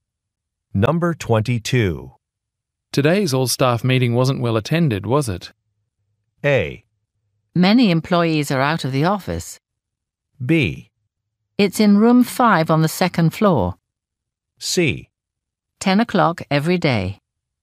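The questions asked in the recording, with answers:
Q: Today's all-staff meeting wasn't well attended, was it?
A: A: Many employees are out of the office.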